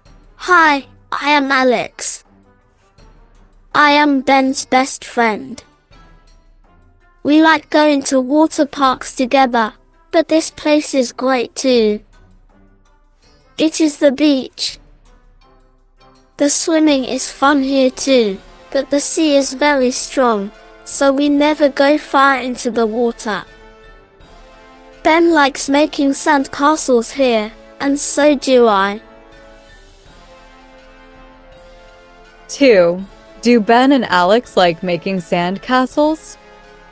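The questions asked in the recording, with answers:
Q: Do Ben and Alex like making sand castles?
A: Yes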